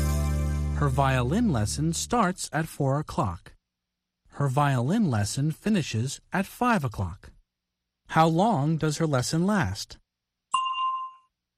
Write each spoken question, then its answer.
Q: How long does her lesson last?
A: An hour. It lasts an hour.